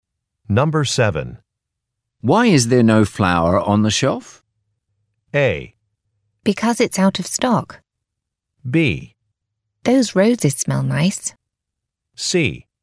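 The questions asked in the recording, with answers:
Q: Why is there no flour on the shelf?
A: A: Because it's out of stock.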